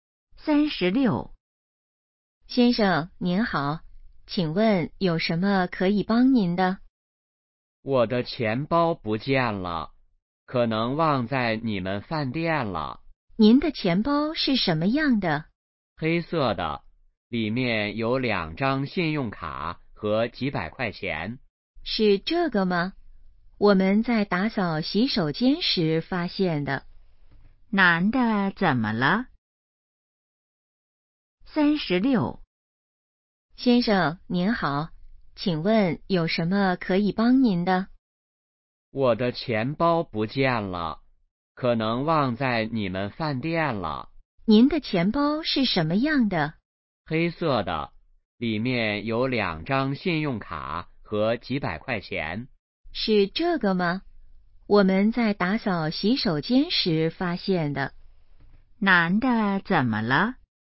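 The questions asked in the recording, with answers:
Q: 男的怎么了?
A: 钱包不见了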